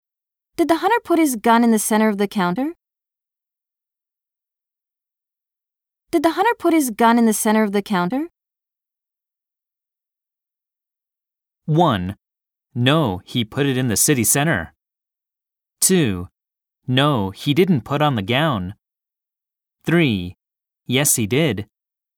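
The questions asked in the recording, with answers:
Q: Did the hunter put his gun in the center of the counter?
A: 3: Yes, he did.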